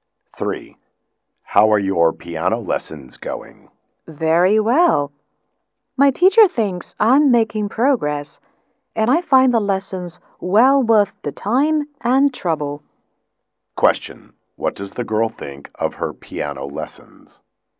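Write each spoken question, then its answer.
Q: What does the girl think of her piano lessons?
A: They are well worth the time and trouble.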